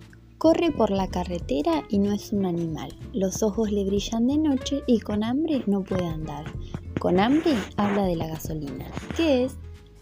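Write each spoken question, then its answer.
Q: ¿Qué es?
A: el coche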